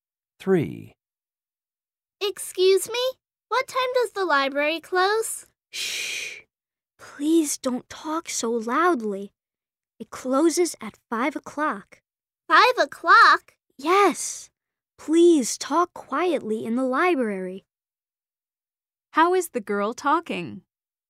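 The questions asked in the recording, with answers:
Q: How is the girl talking?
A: loudly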